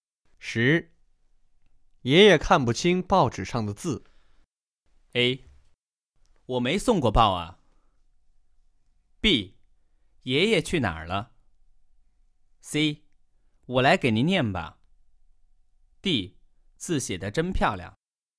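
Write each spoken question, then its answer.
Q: 爷爷看不清报纸上的字。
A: C: 我来给您念吧。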